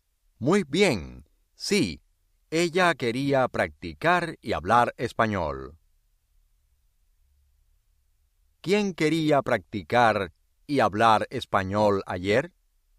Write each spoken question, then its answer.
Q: ¿Quién quería practicar y hablar español ayer?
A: Ana.